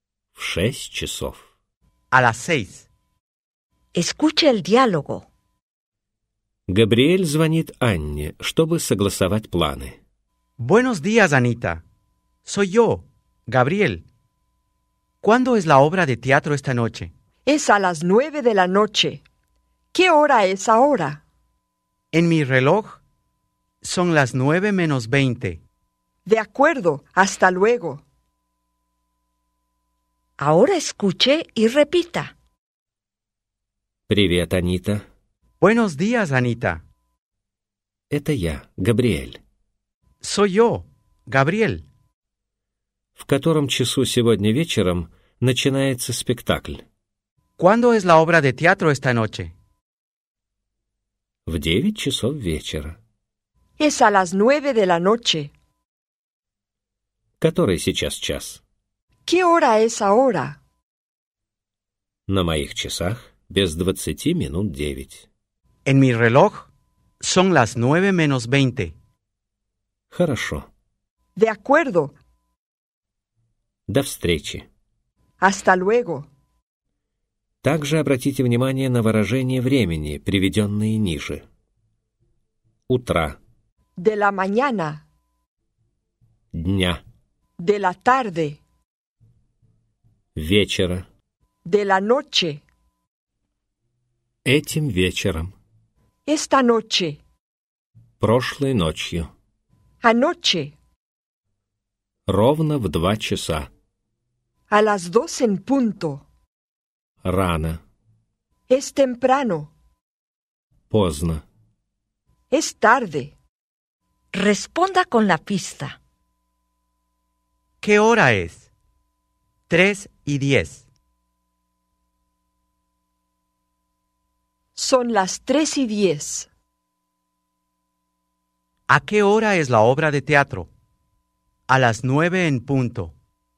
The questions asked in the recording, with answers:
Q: ¿A qué hora es la obra de teatro?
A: La obra de teatro es a las 9:00.